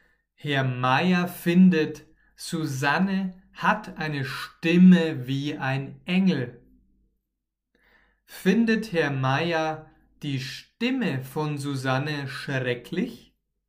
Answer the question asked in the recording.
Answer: Nein, nein, Herr Meier findet Ihre Stimme